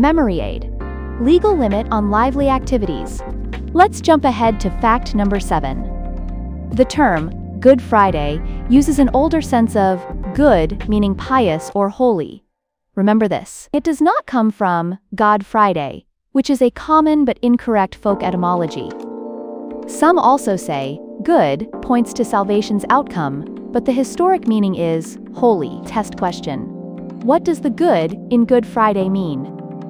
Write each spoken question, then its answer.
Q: What does the good in Good Friday mean?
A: Pious, holy.